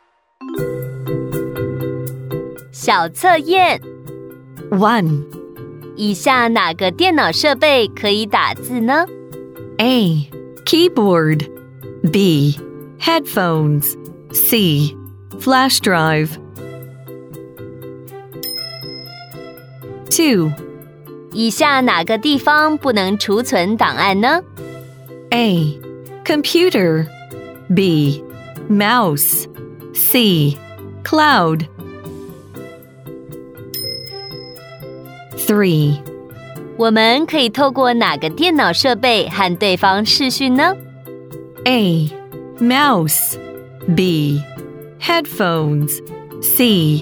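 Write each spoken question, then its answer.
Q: 以下哪个电脑设备可以打字呢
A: A: Keyboard

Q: 以下哪个地方不能储存档案呢?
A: B: Mouse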